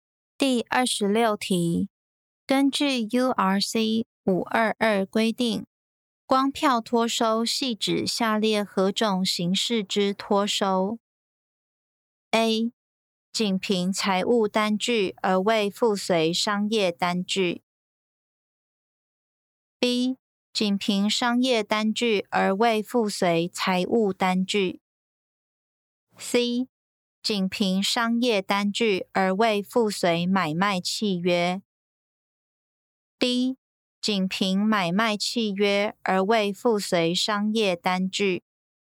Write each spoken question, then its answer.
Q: 根据 URC 522规定,光票脱收系指下列何种形式之脱收 ?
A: 正确答案为 A. 仅凭财务单据而未附随商业单据。